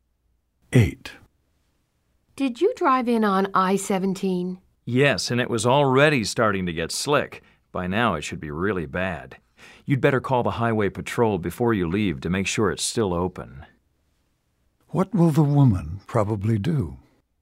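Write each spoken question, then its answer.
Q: What will the woman probably do?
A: Call the highway patrol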